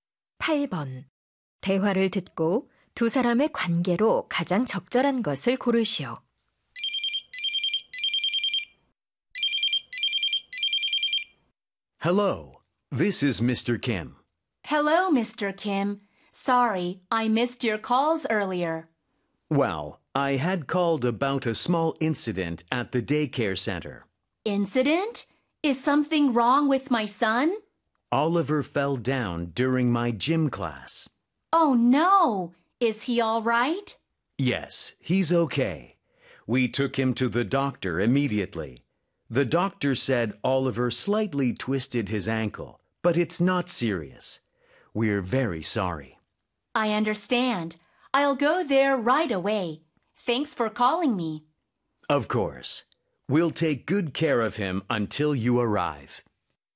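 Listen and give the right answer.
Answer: 어린이집 선생님 - 학부모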